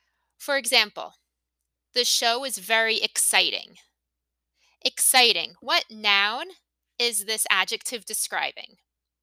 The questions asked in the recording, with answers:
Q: What noun is this adjective describing?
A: It's describing show.